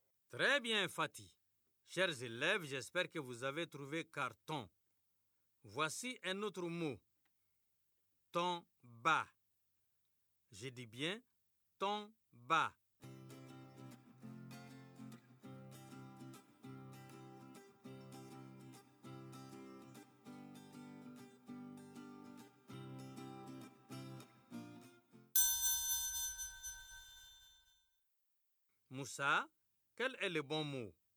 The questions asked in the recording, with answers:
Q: Moussa, quel est le bon mot?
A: Ton bas. C'est bâton, monsieur.